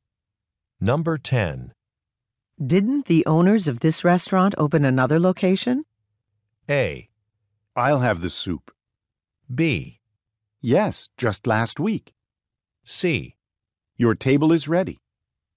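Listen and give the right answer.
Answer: B: Yes, just last week.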